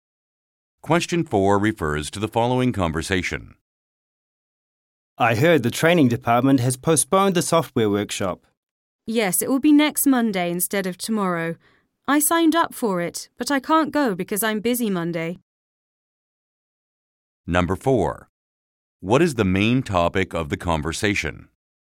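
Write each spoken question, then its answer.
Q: What is the main topic of the conversation?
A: A postponed software workshop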